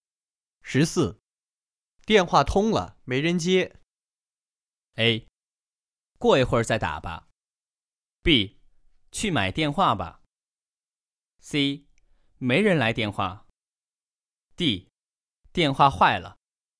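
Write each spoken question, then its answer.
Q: 电话通了没人接。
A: A: 过一会儿再打吧。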